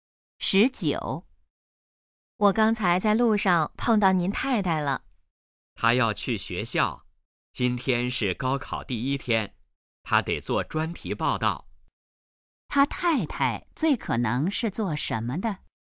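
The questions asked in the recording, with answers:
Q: 他太太最可能是做什么的?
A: 记者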